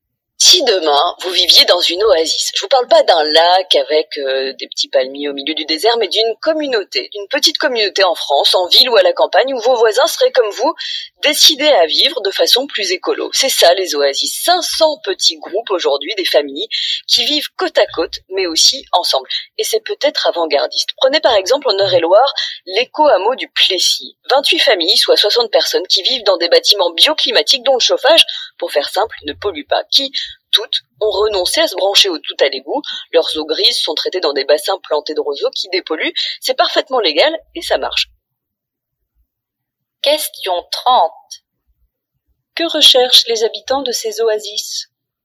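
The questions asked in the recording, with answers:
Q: Que recherchent les habitants de ces oasis ?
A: Vivre de façon plus écologique, en communauté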